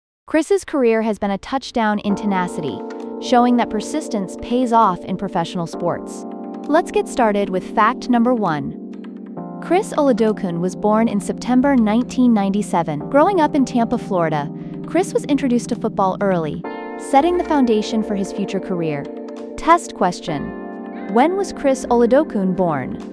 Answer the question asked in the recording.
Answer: September 3, 1997.